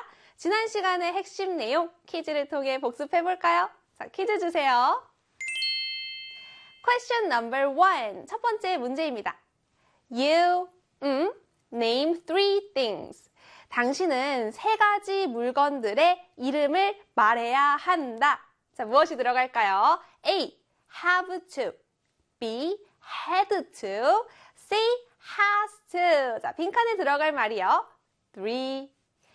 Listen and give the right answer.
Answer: 정답은요? 네, 바로 A의 have to 였지요.